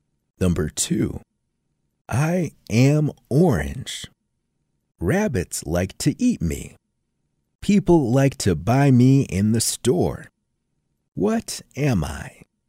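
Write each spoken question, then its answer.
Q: What am I?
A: a carrot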